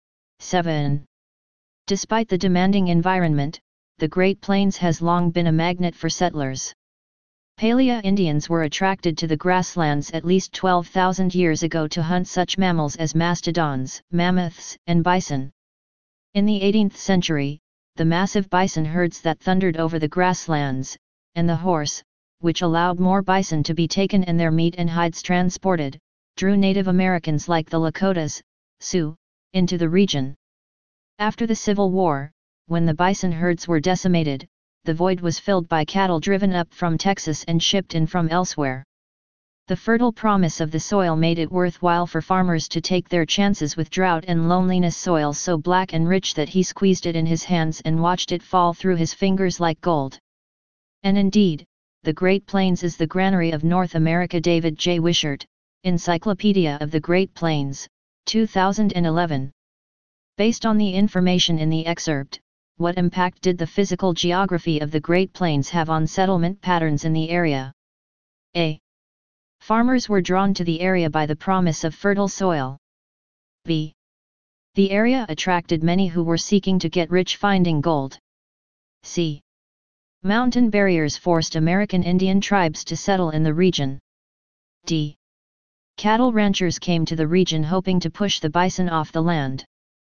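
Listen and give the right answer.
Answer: A: Farmers were drawn to the area by the promise of fertile soil.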